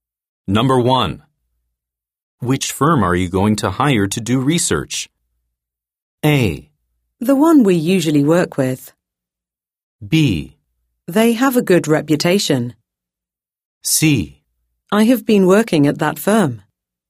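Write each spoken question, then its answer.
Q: Which firm are you going to hire to do research?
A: A: The one we usually work with.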